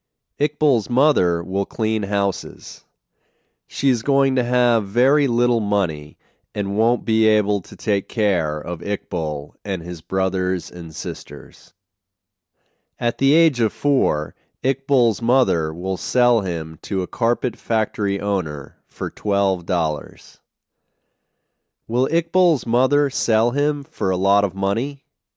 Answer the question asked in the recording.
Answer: No, she won't sell him for a lot of money.